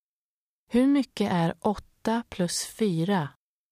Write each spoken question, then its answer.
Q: Hur mycket är 8 plus 4?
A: 12.